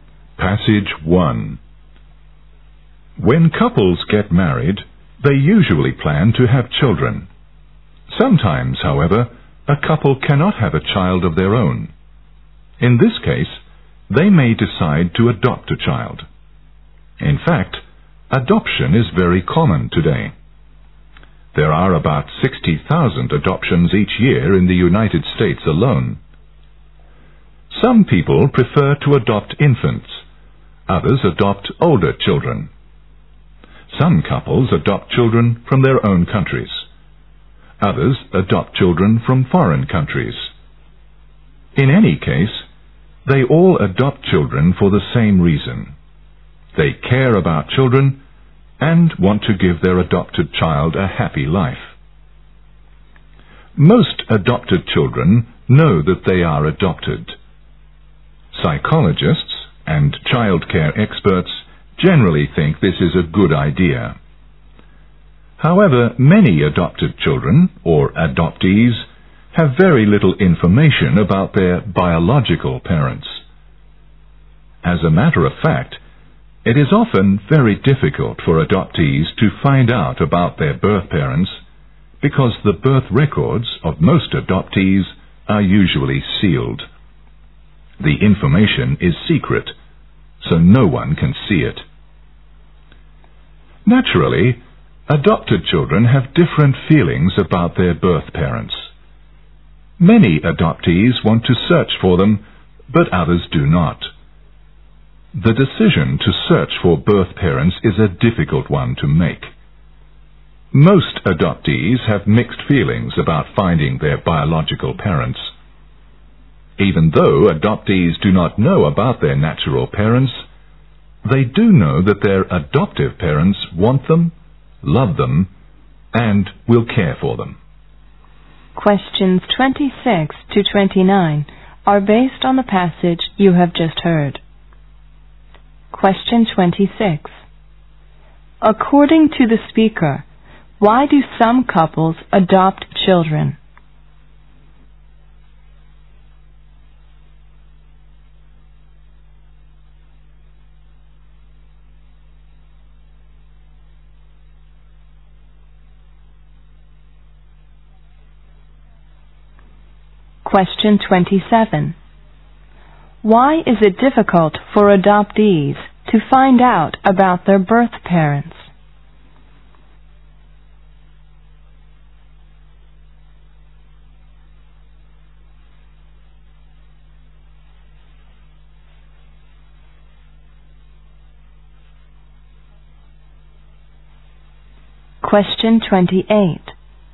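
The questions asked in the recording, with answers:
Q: Why is it difficult for adoptees to find out about their birth parents?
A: Their birth records are usually sealed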